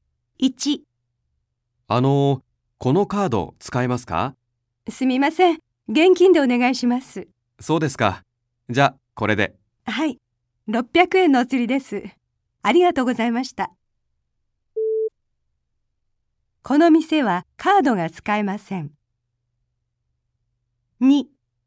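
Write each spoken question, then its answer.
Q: この店はカードが使えません。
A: ○(正しい)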